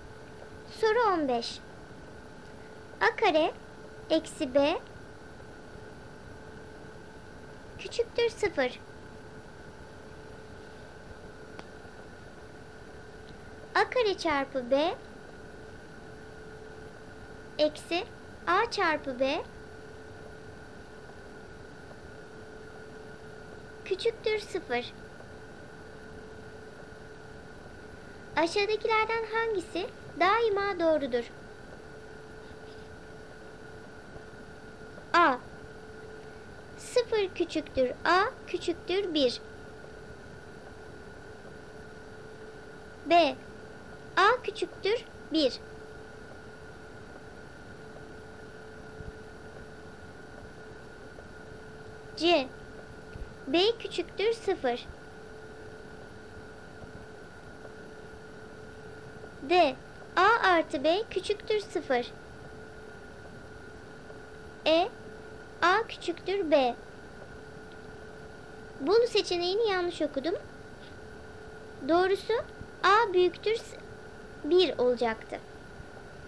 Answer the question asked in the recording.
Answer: Ve doğru cevap a seçeneği a 0 küçüktür a küçüktür 1.